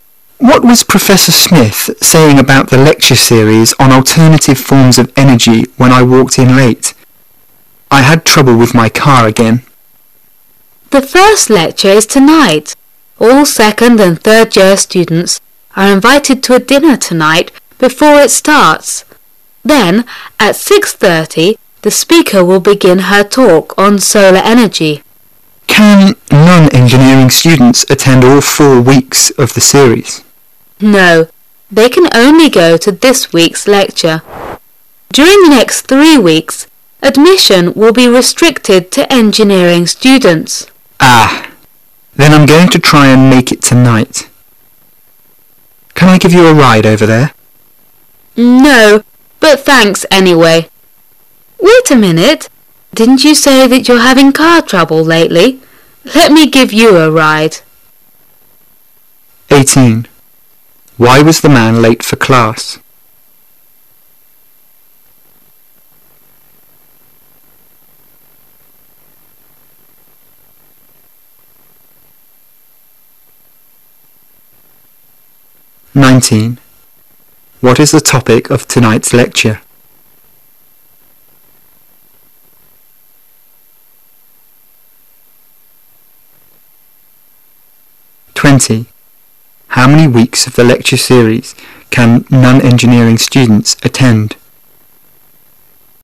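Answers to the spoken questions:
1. He had car trouble.
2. Solar energy
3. One week (only this week's lecture)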